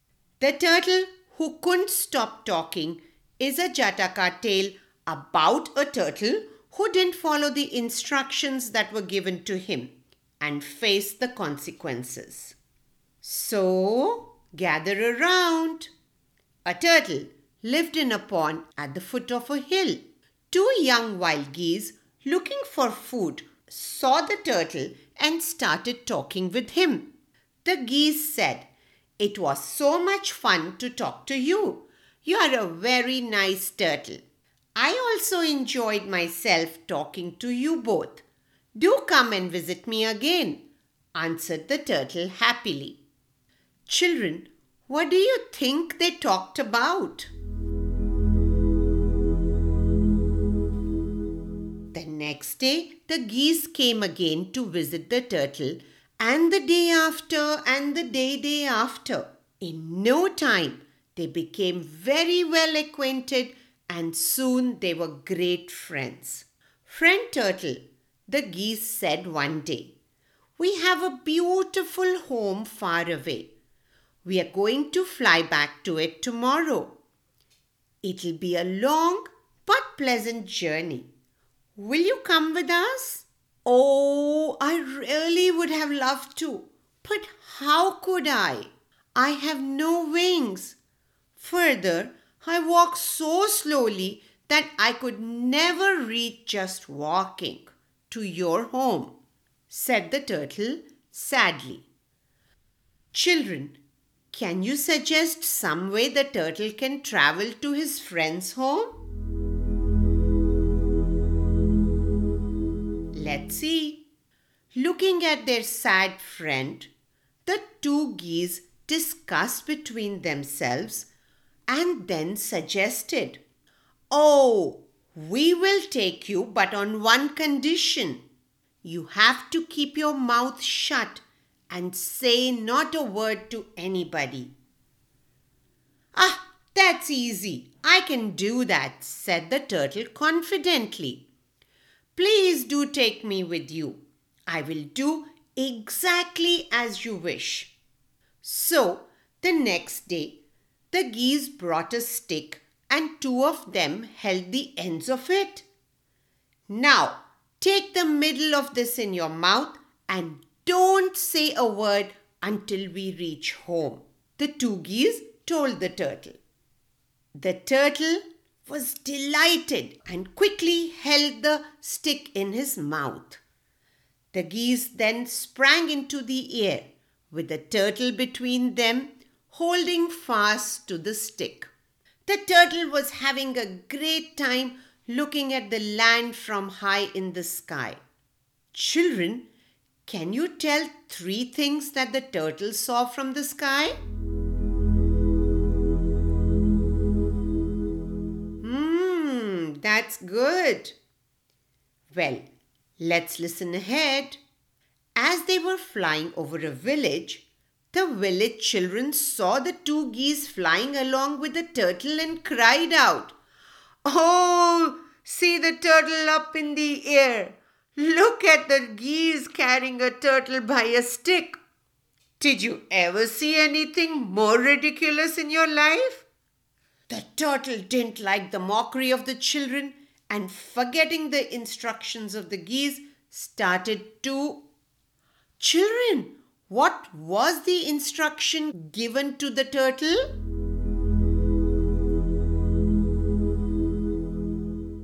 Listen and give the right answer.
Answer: Yes, the geese had instructed the turtle not to open his mouth till they reach home.